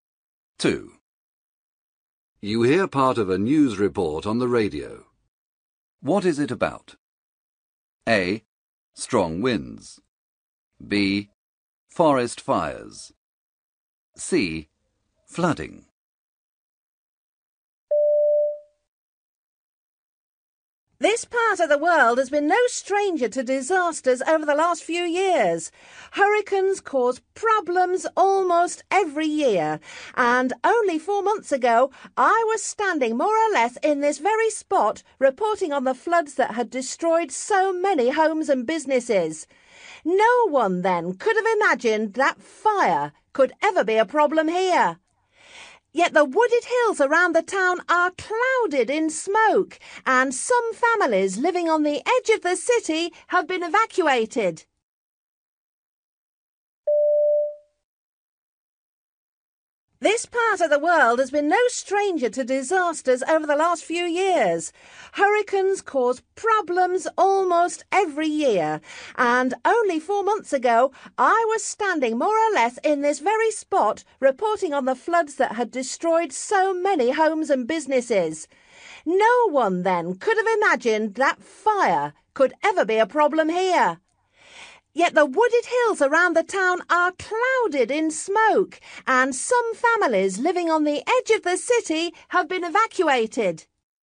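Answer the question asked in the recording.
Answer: B: Forest fires.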